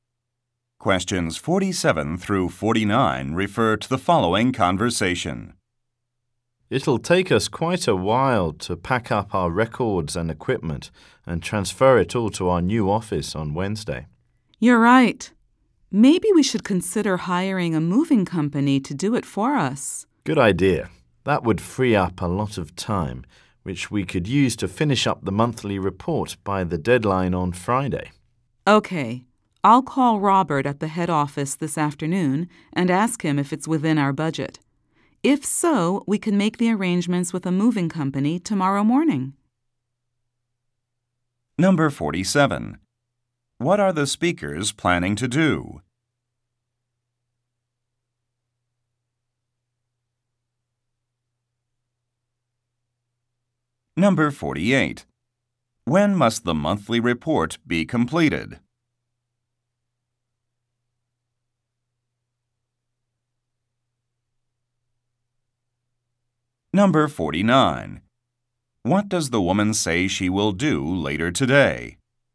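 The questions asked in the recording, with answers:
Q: What are the speakers planning to do?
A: Move to a new office

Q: When must the monthly report be completed?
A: By Friday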